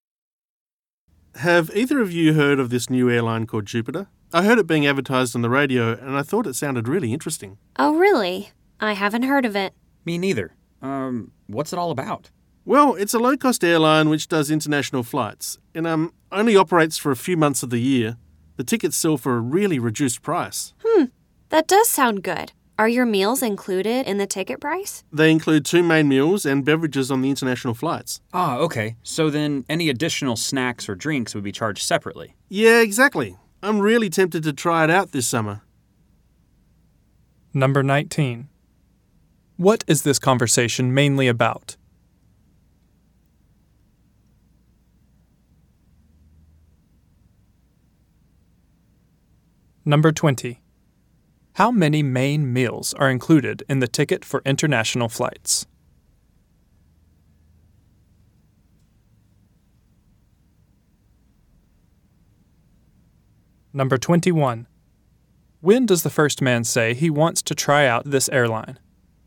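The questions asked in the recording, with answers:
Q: What is this conversation mainly about?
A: A new low-cost airline called Jupiter

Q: How many main meals are included in the ticket for international flights?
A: Two

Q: When does the first man say he wants to try out this airline?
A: This summer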